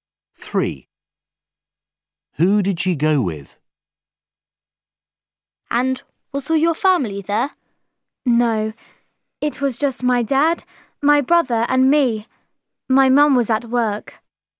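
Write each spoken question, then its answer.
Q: Who did she go with?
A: Her dad and her brother.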